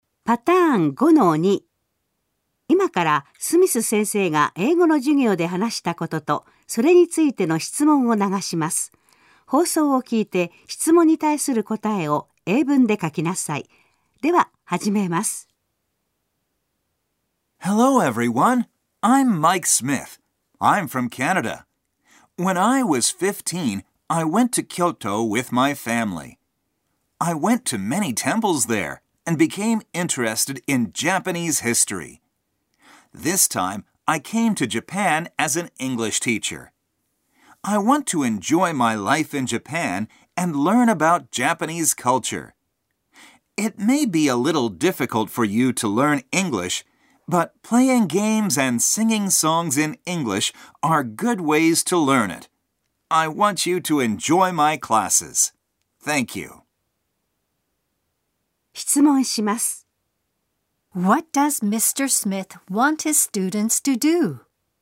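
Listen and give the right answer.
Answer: He wants them to enjoy his classes.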